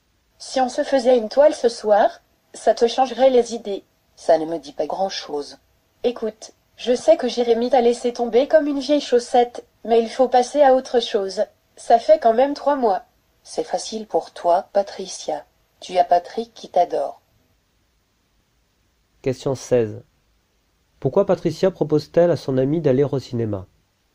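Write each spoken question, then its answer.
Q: Pourquoi Patricia propose-t-elle à son amie d'aller au cinéma?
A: Pour lui changer les idées après que Jérémy l'a quittée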